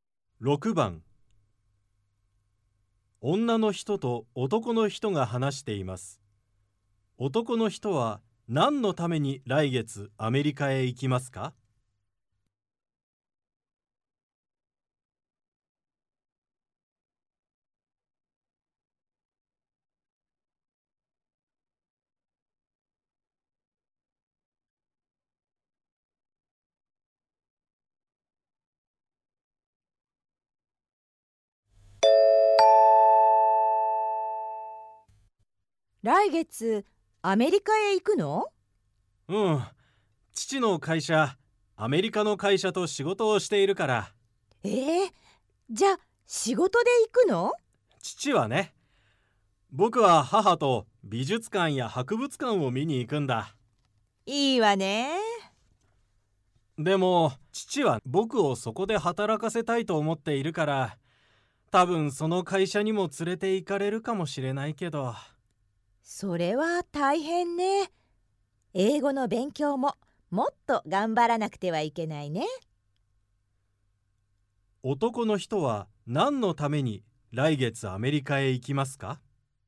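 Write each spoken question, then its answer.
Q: 男の人は何のために来月アメリカへ行きますか?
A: 母と美術館や博物館を見に行くため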